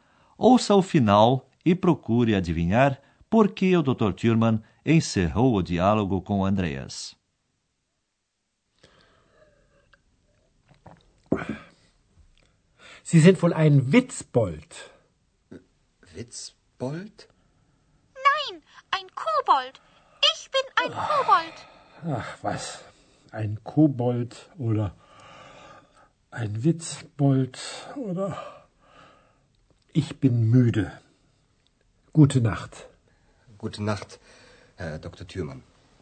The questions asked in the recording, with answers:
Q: Ouça o final e procure adivinhar por que o Dr. Thurman encerrou o diálogo com Andreas.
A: Bem, o Dr. Thurman pôs um ponto final na conversa porque estava cansado.